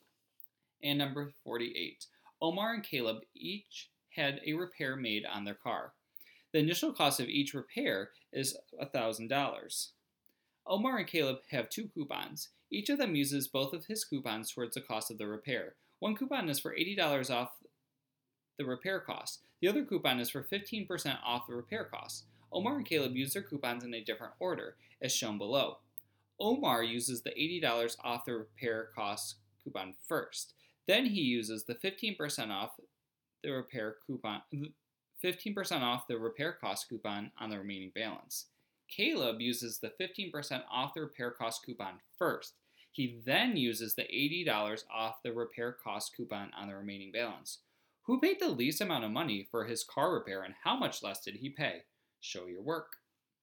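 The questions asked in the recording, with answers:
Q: Who paid the least amount of money for his car repair, and how much less did he pay?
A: Caleb, $12 less ($770 vs $782)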